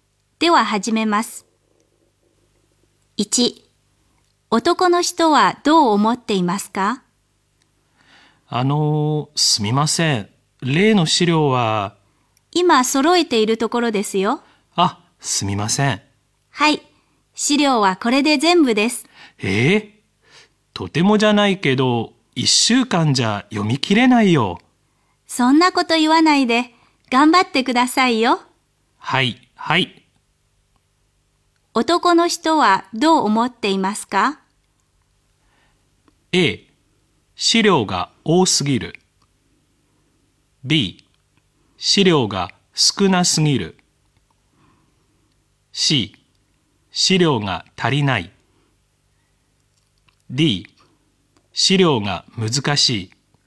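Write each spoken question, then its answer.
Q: 男の人はどう思っていますか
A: A: 資料が多すぎる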